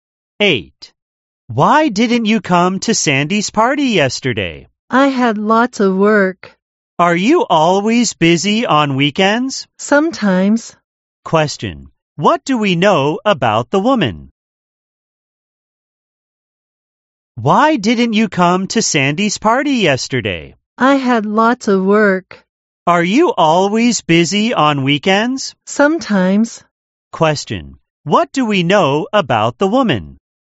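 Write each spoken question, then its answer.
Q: What do we know about the woman?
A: She had lots of work and missed Sandy's party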